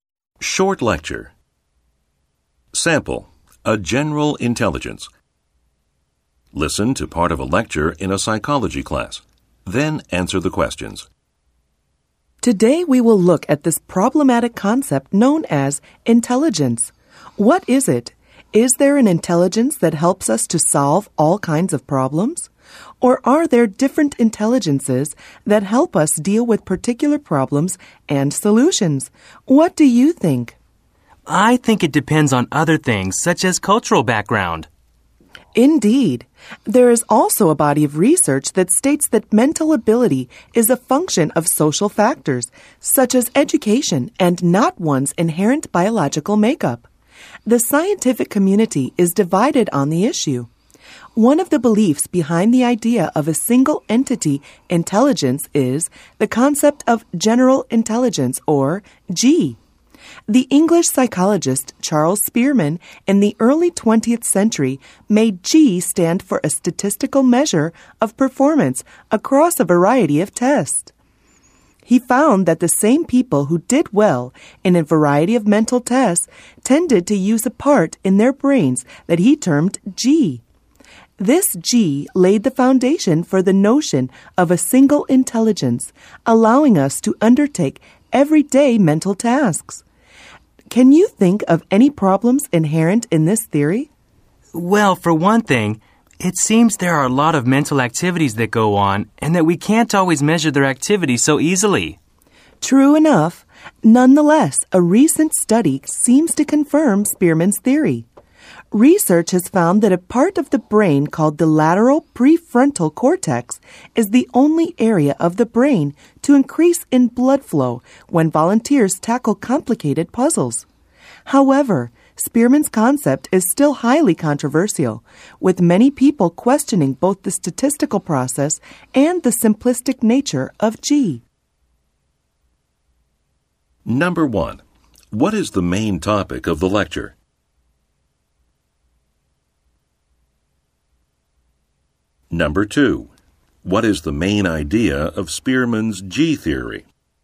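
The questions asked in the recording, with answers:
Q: what is the main topic of the lecture?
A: The concept of intelligence, especially Spearman's idea of general intelligence (G)

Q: what is the main idea of Spearman's G theory?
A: There is one general intelligence, shown by the same people doing well across different mental tests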